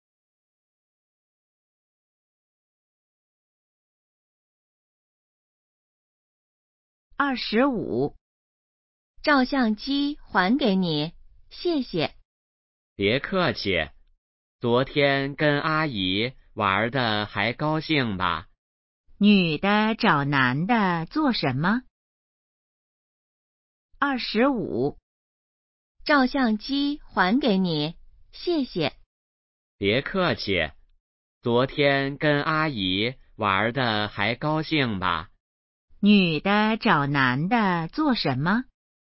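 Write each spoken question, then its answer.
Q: 女的找男的做什么?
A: 还照相机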